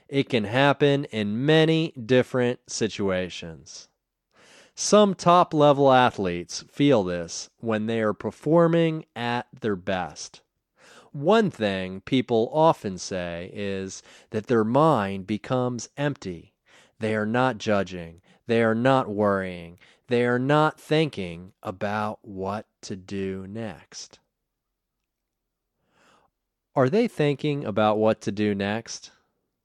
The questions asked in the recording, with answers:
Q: Are they thinking about what to do next?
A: No, they are not thinking about what to do next.